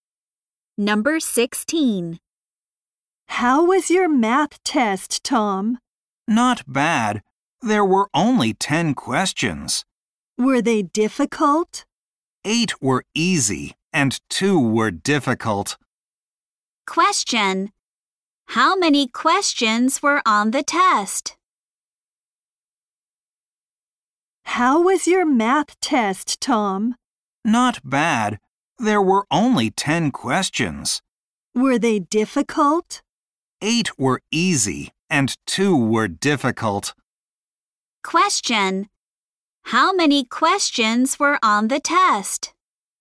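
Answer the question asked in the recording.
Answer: 10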